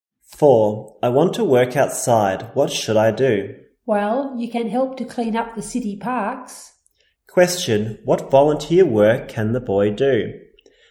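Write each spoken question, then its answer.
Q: What volunteer work can the boy do?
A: Help to clean up the city parks.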